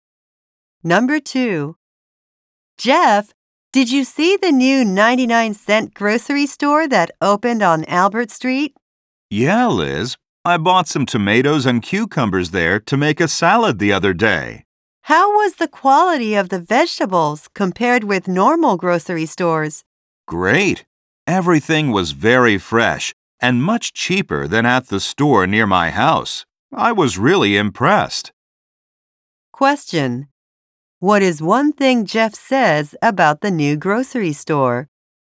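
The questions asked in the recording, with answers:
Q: What is one thing Jeff says about the new grocery store?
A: The vegetables are fresh and cheap.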